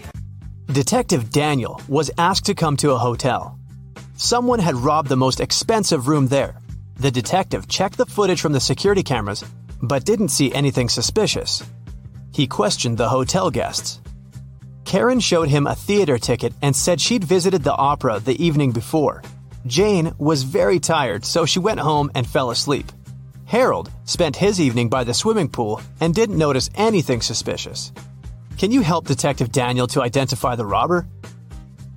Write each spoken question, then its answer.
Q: Can you help Detective Daniel to identify the robber?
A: Jane was a hotel guest. Why would she go home to sleep?